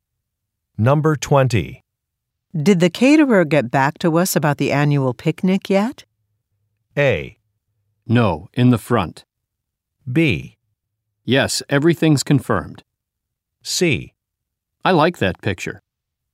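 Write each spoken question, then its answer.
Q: Did the caterer get back to us about the annual picnic yet?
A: B: Yes, everything's confirmed.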